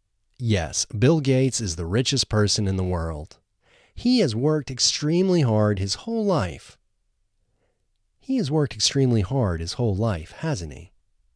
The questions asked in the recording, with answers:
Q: He has worked extremely hard his whole life, hasn't he?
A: Yes, he has worked extremely hard his whole life.